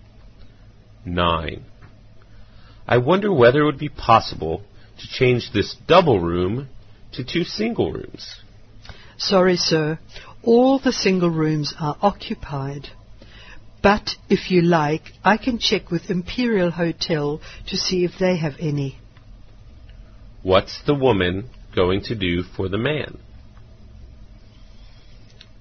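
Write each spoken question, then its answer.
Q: What's the woman going to do for the man?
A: Check with Imperial Hotel for single rooms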